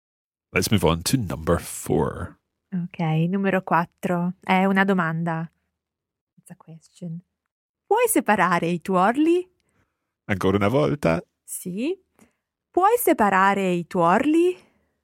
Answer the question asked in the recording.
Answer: can you separate the yolks?